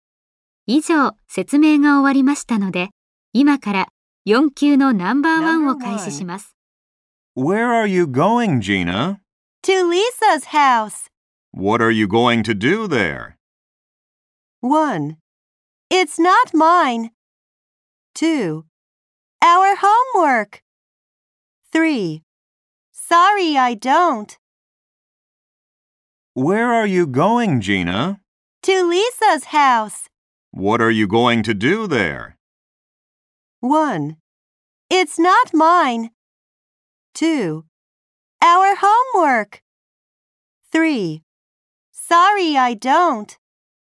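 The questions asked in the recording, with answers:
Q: What are you going to do there?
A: 2: Our homework.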